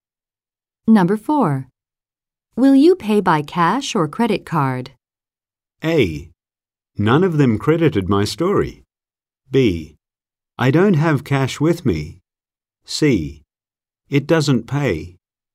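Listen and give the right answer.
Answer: B: I don't have cash with me.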